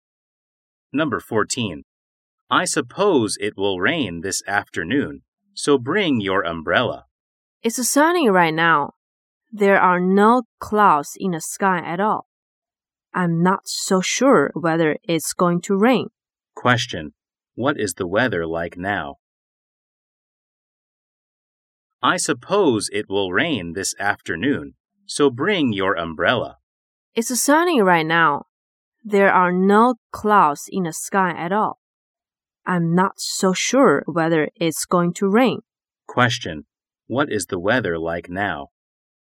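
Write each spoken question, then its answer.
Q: What is the weather like now?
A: Sunny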